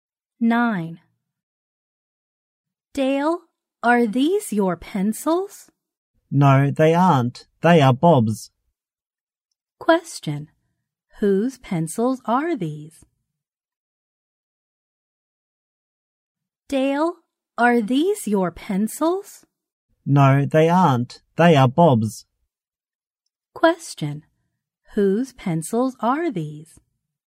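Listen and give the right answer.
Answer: Bob's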